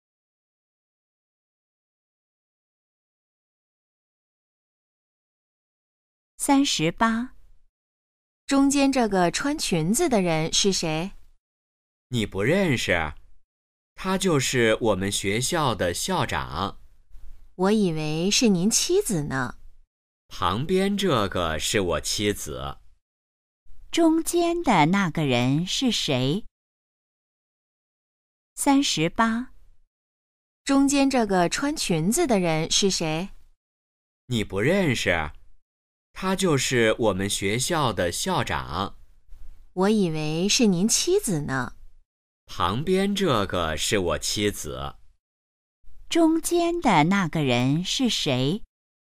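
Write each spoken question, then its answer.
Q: 中间的那个人是谁?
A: 学校的校长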